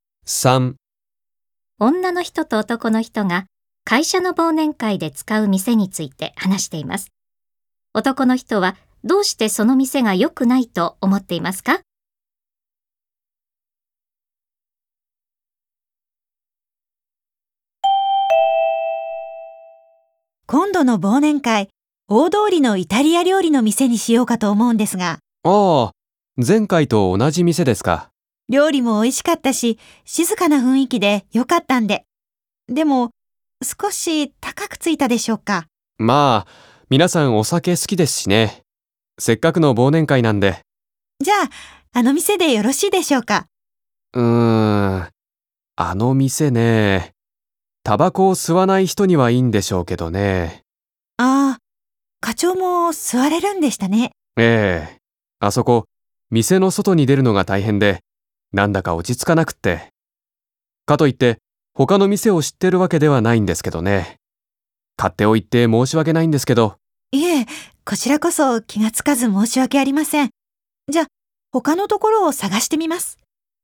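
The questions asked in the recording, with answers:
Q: 男の人はどうしてその店が良くないと思っていますか?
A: タバコを吸うのに店の外に出なければならず、落ち着かないから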